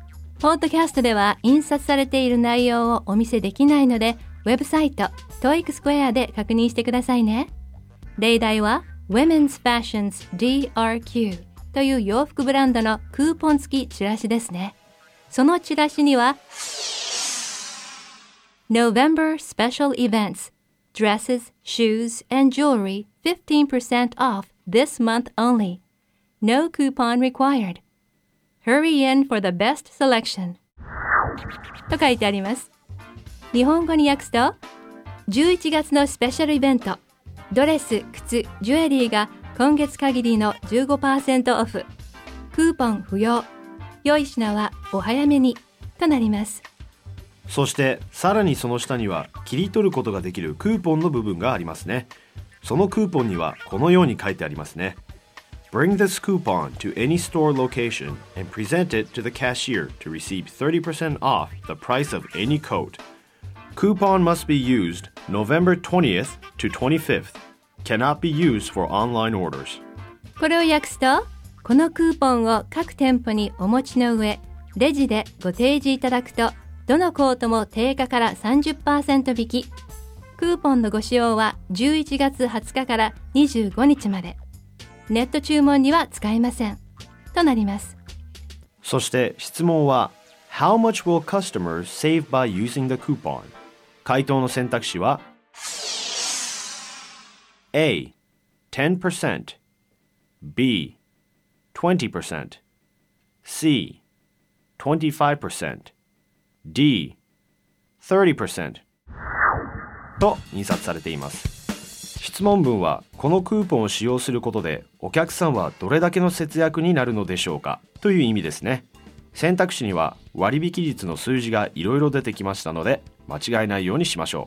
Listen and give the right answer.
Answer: D の30%が正解となります